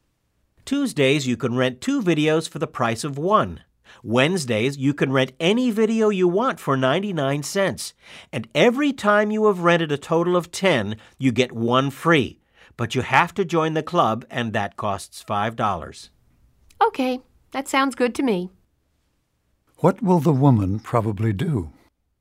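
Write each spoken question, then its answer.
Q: What will the woman probably do?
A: Join the video club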